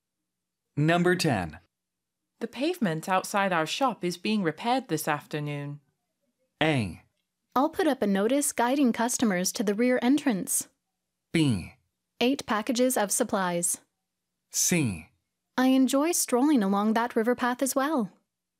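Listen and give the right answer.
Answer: A: I'll put up a notice guiding customers to the rear entrance.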